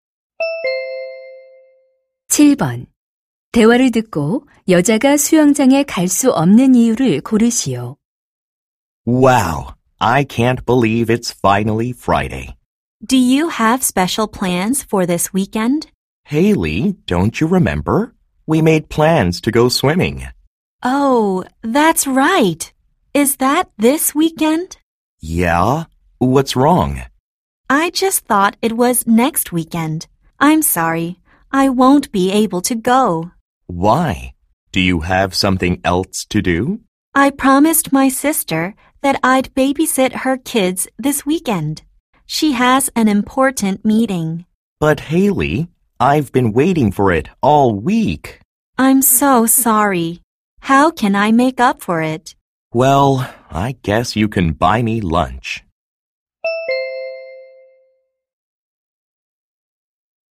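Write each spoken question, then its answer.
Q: 대화를 듣고 여자가 수영장에 갈 수 없는 이유를 고르시오.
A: 언니(여동생)의 아이들을 돌봐야 해서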